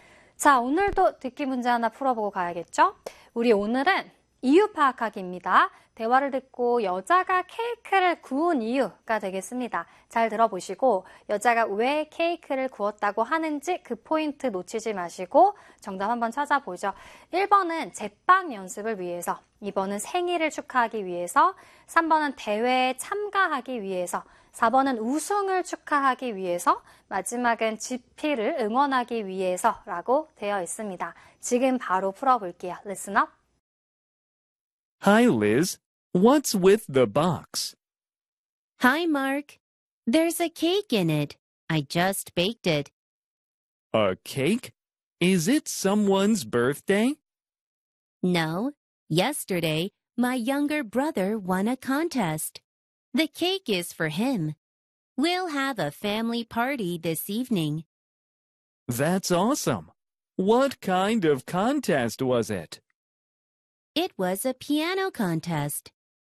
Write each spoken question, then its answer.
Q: 대화를 듣고 여자가 케이크를 구운 이유가 되겠습니다.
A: 우리 정답은 아까 앞부분에서 우승을 축하하기 위해서 로 찾아줄 수 있을 것 같아요.